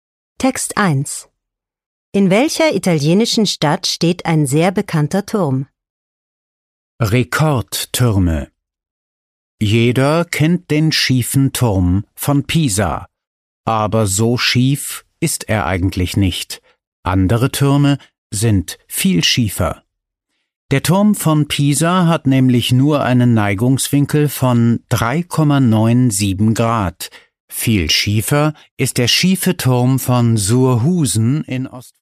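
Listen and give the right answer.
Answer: In Pisa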